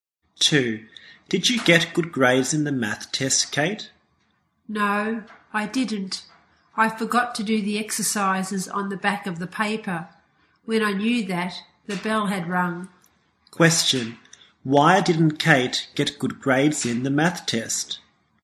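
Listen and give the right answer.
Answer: She forgot to do the exercises on the back of the paper.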